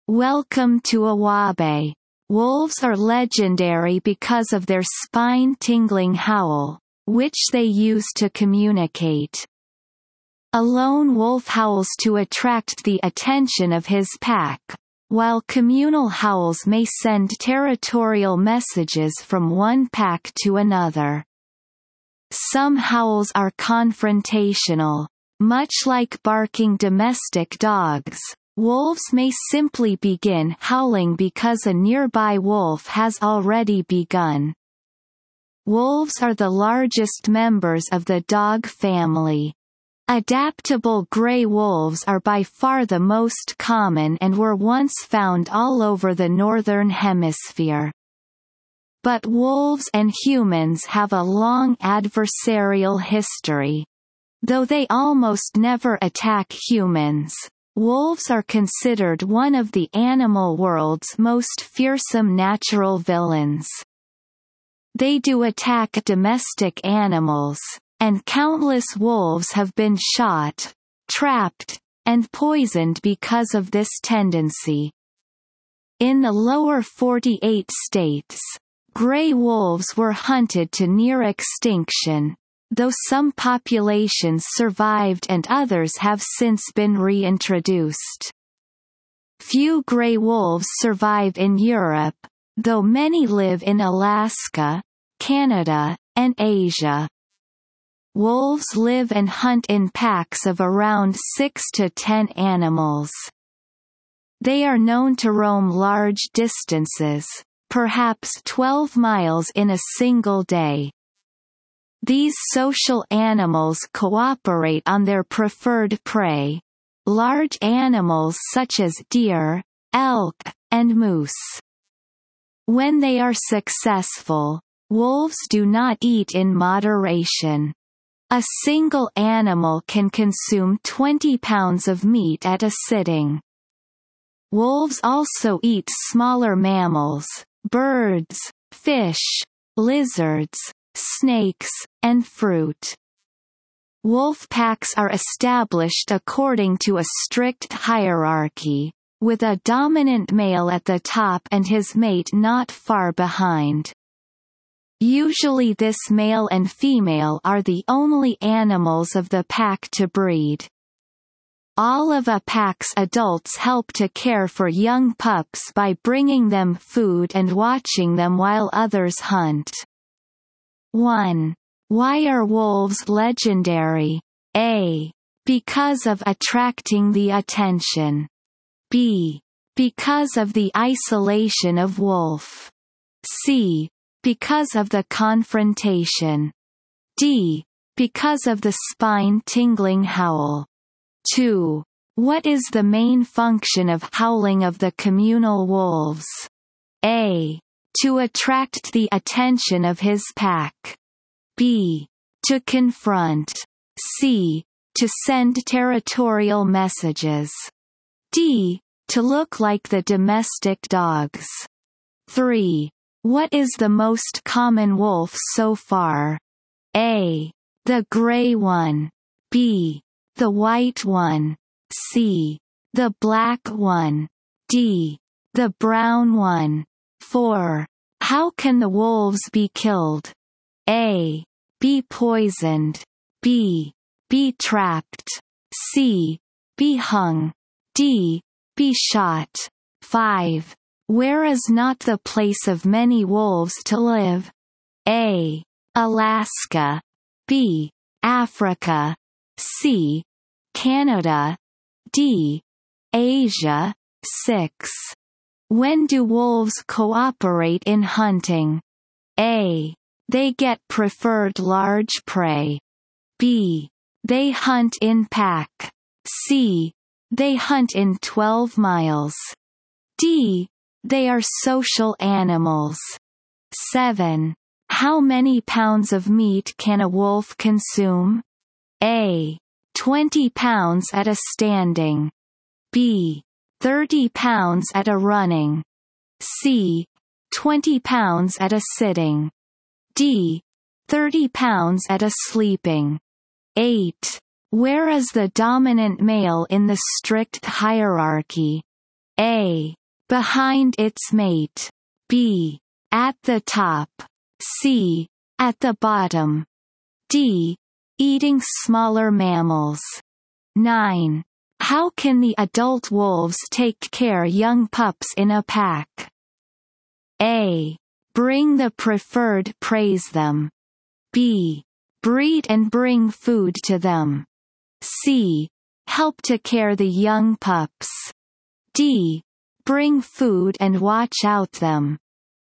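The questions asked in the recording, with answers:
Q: Why are wolves legendary?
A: D: Because of the spine-tingling howl.

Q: What is the main function of howling of the communal wolves?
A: C: To send territorial messages.

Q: What is the most common wolf so far?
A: A: The gray one.

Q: Where is not the place of many wolves to live?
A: B: Africa.

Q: How many pounds of meat can a wolf consume?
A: C: 20 pounds at a sitting.

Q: Where is the dominant male in the strict hierarchy?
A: B: At the top.

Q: How can the adult wolves take care young pups in a pack?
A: D: Bring food and watch out them.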